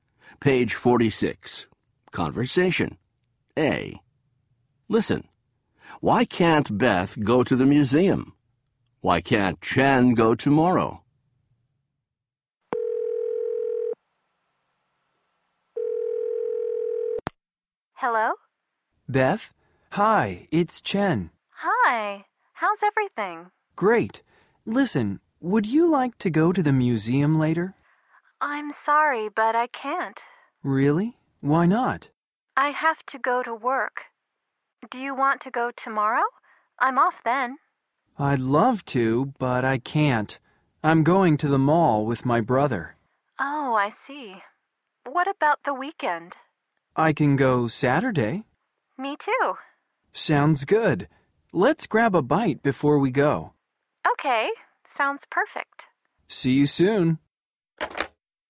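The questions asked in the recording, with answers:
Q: Why can't Beth go to the museum?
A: She has to go to work.

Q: Why can't Chen go tomorrow?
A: He's going to the mall with his brother.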